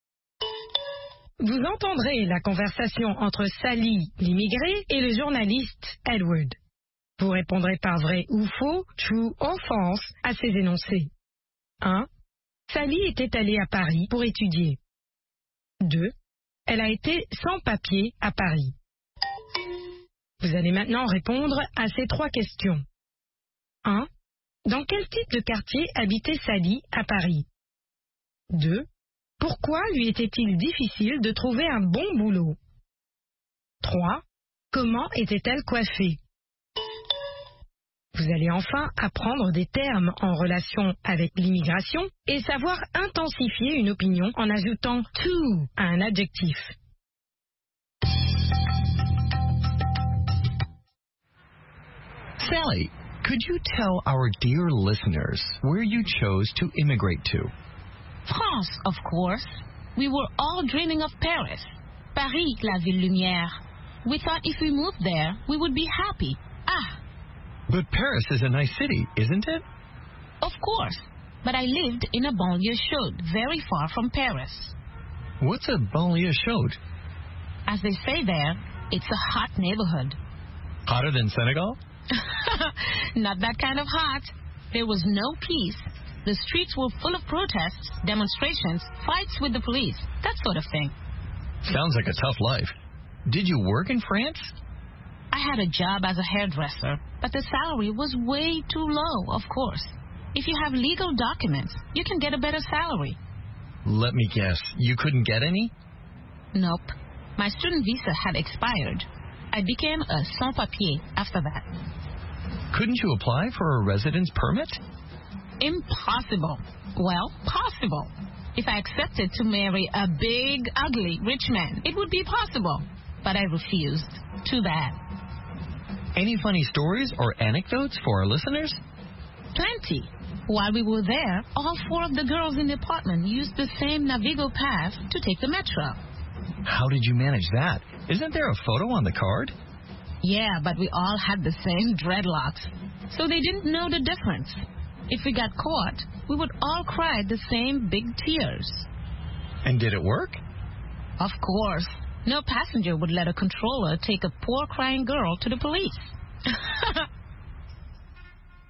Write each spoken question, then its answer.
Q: Sally était allée à Paris pour étudier.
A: L'énoncé 1 est vrai. Sally était allée à Paris pour étudier.

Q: Elle a été sans papier à Paris.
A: L'énoncé 2 est vrai. Elle a été sans papier à Paris.

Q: Dans quel type de quartier habitait Sally à Paris?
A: Dans une banlieue chaude.

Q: Pourquoi lui était-il difficile de trouver un bon boulot?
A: Elle était sans papier.

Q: Comment était-elle coiffée?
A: En dreadlocks.